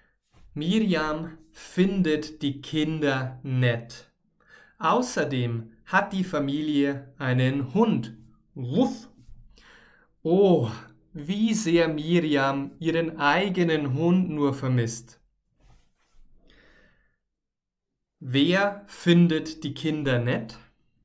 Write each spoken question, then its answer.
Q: Wer findet die Kinder nett?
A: Miriam, genau. Miriam findet die Kinder nett.